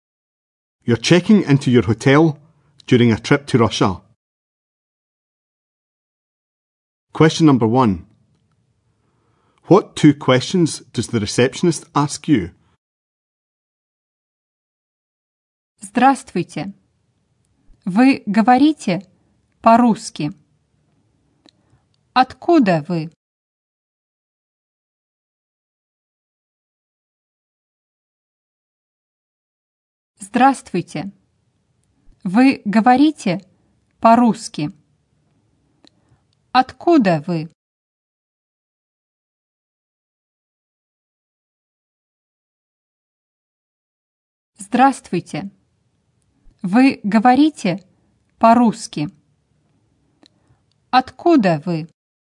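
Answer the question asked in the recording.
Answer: Do you speak Russian? Where are you from?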